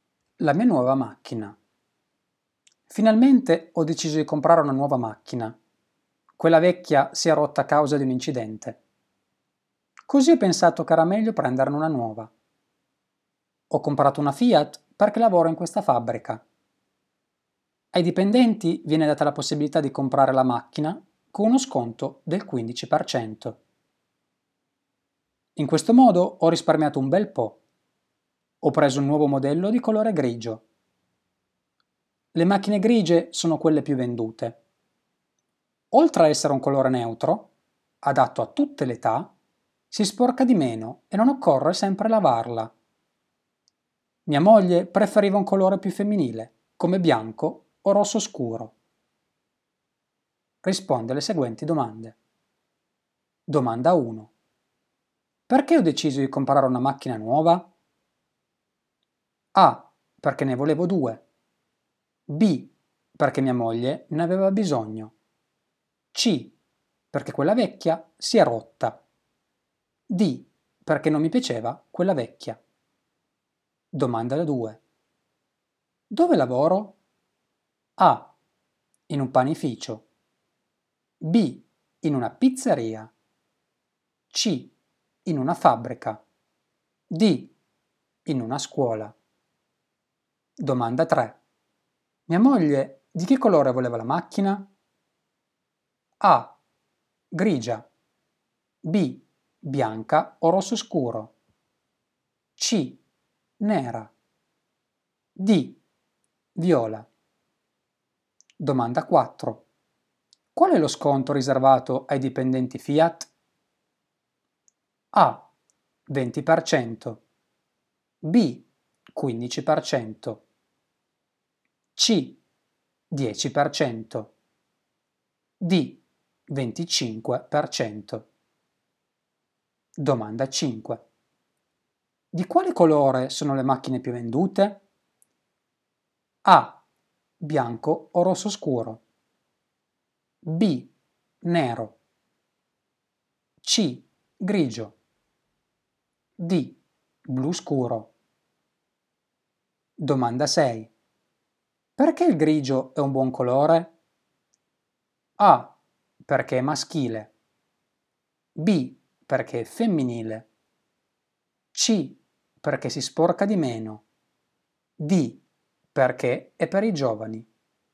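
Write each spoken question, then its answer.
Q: Perché ho deciso di comprare una macchina nuova?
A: C: perché quella vecchia si è rotta

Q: Dove lavoro?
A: C: in una fabbrica

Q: Mia moglie di che colore voleva la macchina?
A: B: Bianca o rosso scuro

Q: Qual è lo sconto riservato ai dipendenti Fiat?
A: B: 15%

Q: Di quale colore sono le macchine più vendute?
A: C: Grigio

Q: Perché il grigio è un buon colore?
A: C: Perché si sporca di meno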